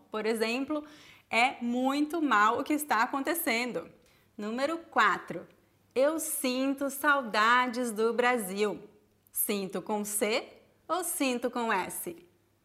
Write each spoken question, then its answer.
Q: Sinto com C ou sinto com S?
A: Sinto com S.